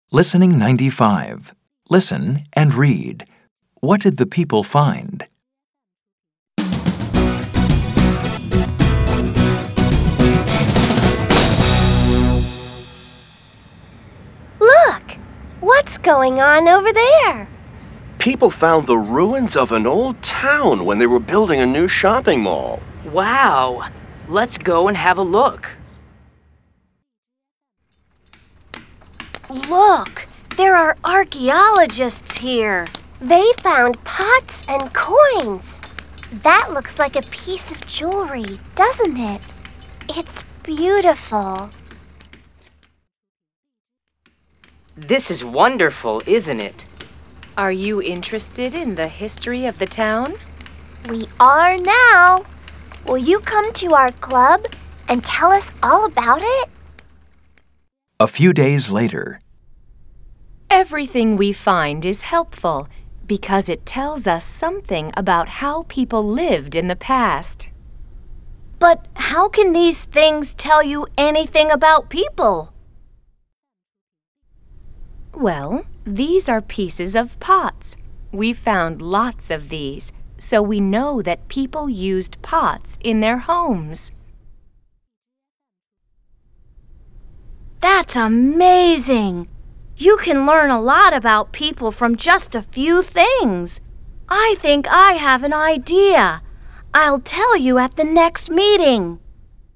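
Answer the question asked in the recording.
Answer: The ruins of an old town (with pots, coins and jewelry)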